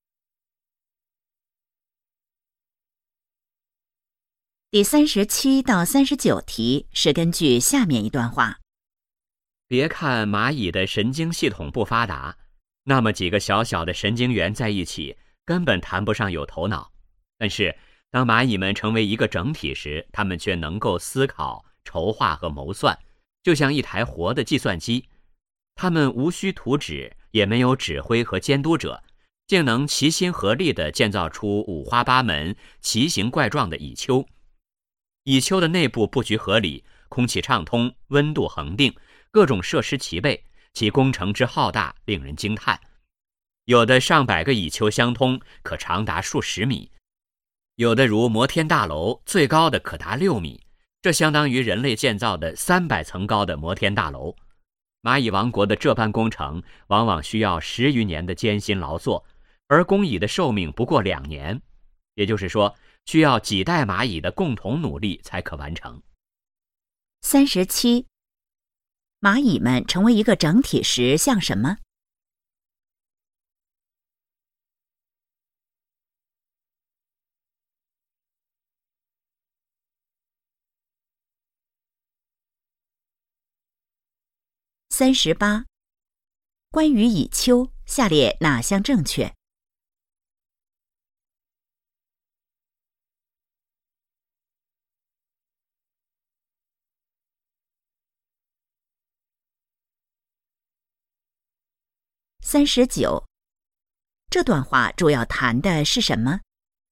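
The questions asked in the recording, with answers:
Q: 蚂蚁们成为一个整体时像什么?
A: 一台活的计算机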